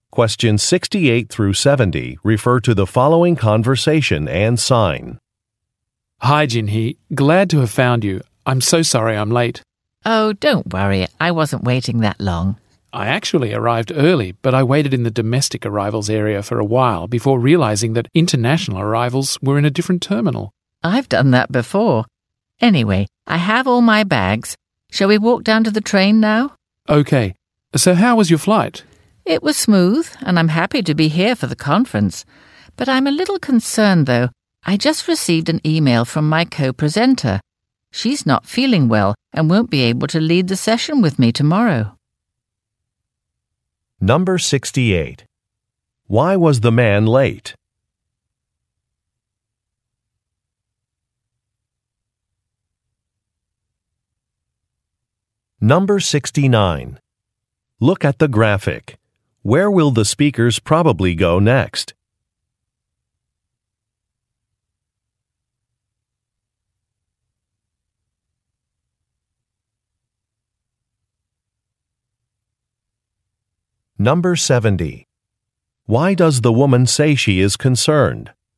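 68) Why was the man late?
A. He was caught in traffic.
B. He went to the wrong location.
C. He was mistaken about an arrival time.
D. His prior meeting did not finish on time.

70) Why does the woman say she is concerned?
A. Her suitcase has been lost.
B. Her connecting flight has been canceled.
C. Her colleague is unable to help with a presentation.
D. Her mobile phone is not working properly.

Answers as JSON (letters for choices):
{"68": "B", "70": "C"}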